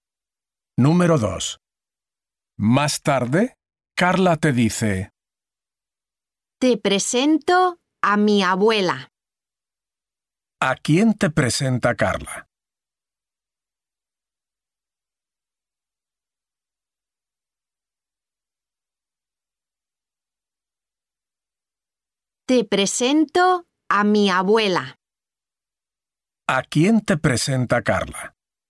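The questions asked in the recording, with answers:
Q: ¿A quién te presenta Carla?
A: A su abuela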